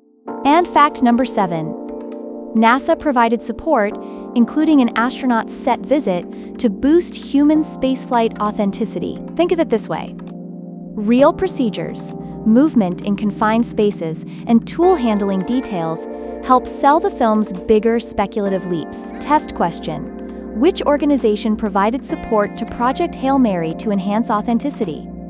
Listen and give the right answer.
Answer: Correct answer, NASA.